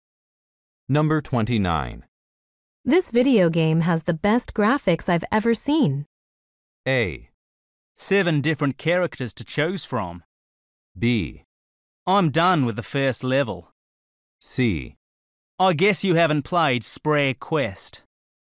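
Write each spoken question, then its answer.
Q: This video game has the best graphics I've ever seen.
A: C: I guess you haven't played Sprague Quest.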